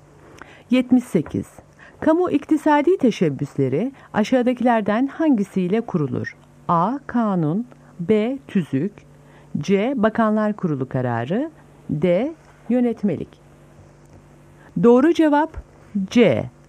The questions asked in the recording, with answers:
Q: Kamu iktisadi teşebbüsleri aşağıdakilerden hangisiyle kurulur?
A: Doğru cevap C.